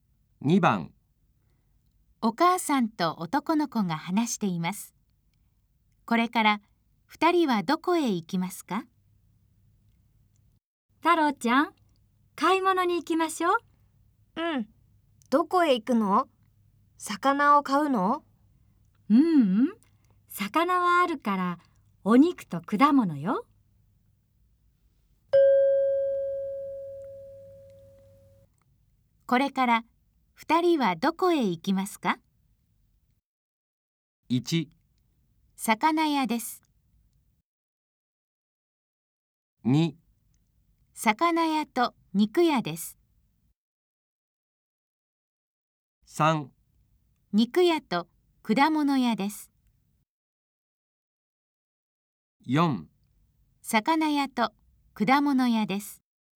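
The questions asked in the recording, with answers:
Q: これから2人はどこへ行きますか?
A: 3: 肉屋と果物屋です。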